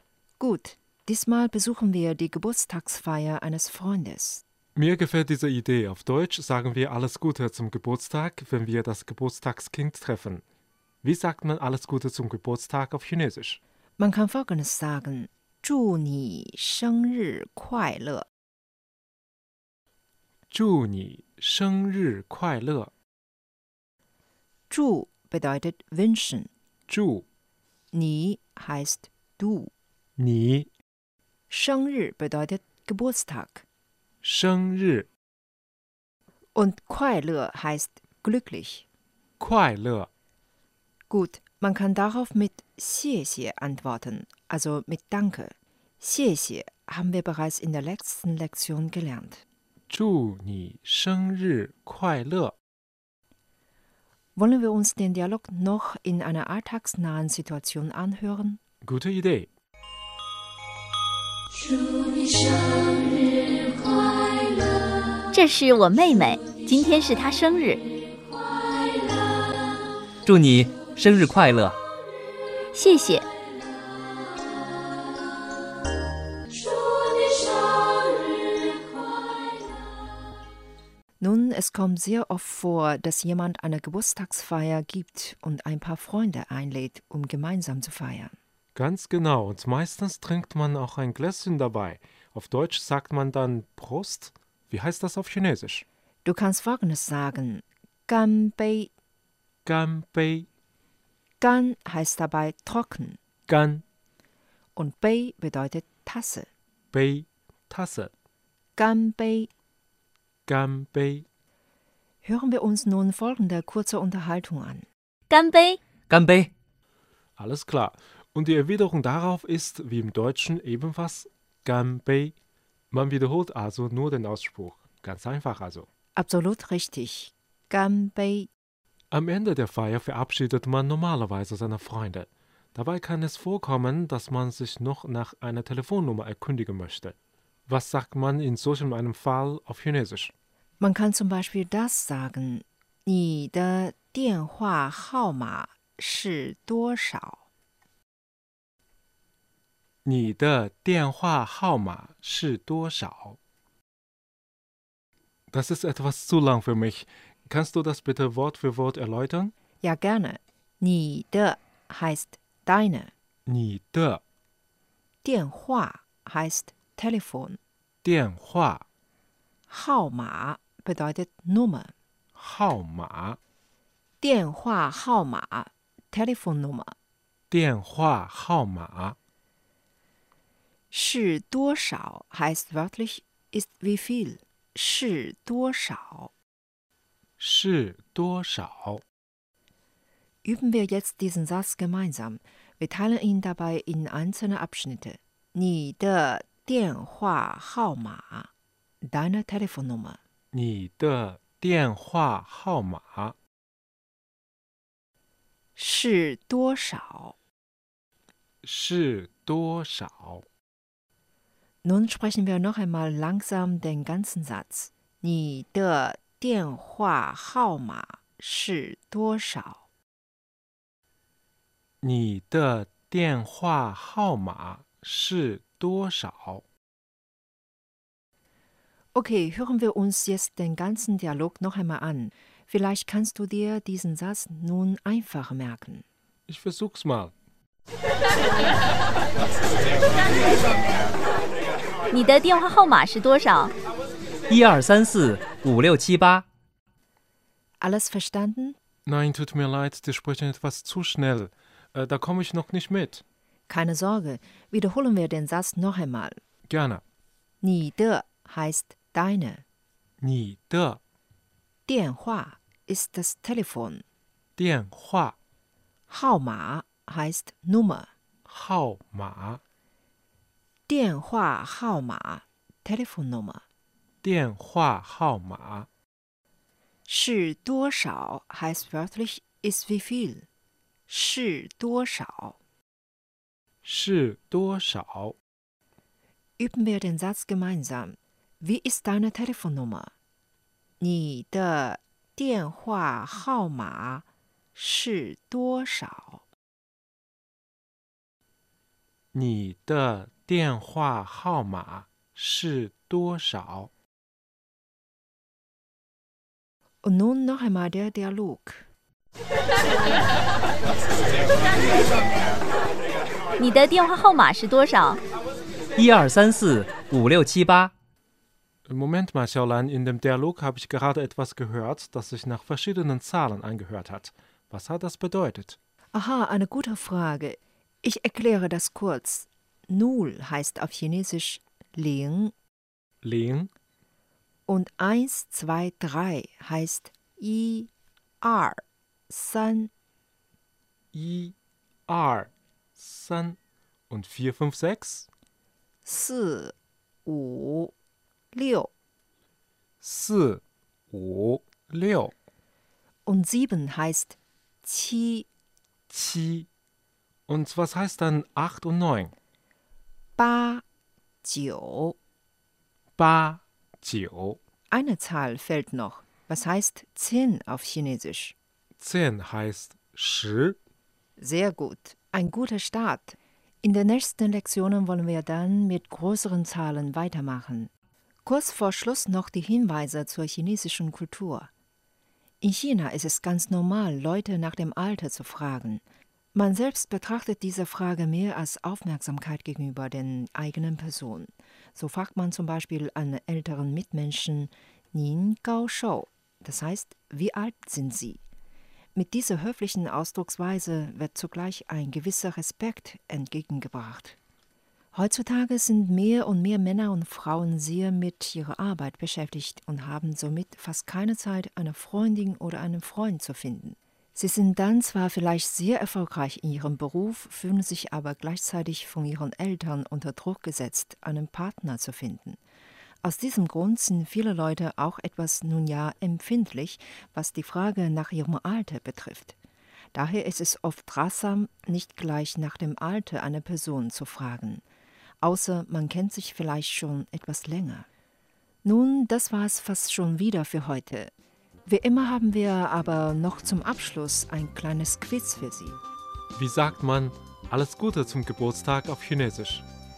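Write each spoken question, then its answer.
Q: Wie sagt man alles Gute zum Geburtstag auf Chinesisch?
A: 祝你生日快乐 (zhù nǐ shēngrì kuàilè)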